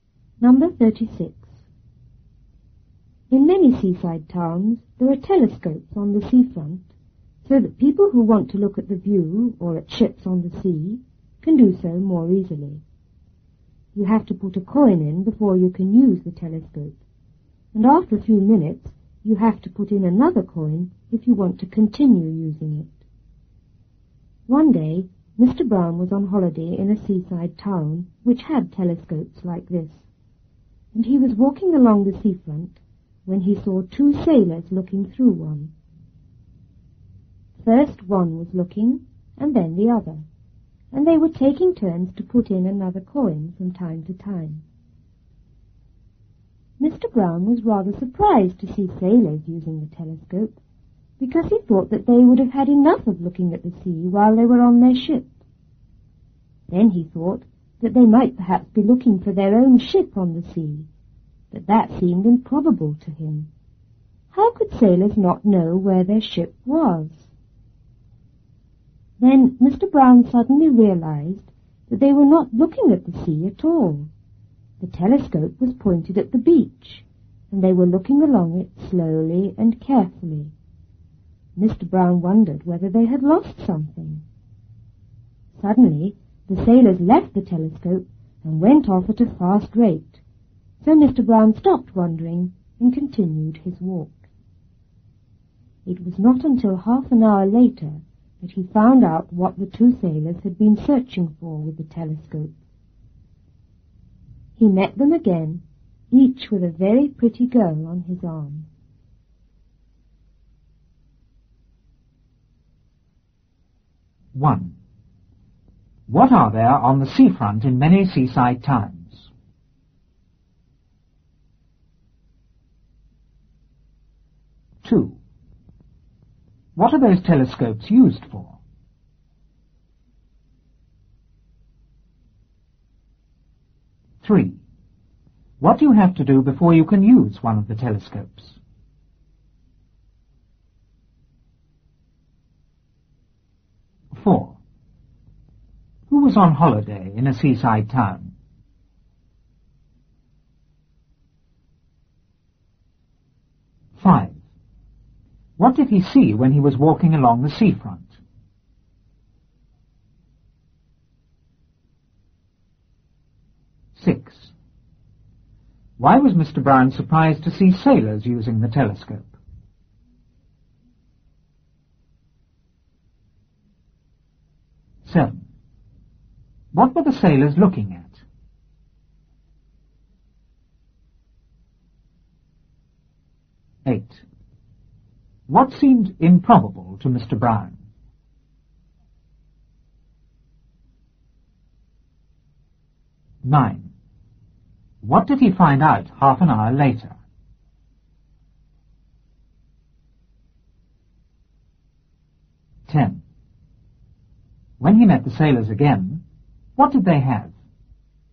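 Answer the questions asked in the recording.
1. Telescopes
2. To look at the view or at ships on the sea more easily
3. Put a coin in
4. Mr. Brown
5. Two sailors looking through a telescope
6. He thought they would have had enough of looking at the sea on their ship
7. The beach
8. That they were looking for their own ship on the sea
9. What the sailors had been searching for: pretty girls
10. Each had a very pretty girl on his arm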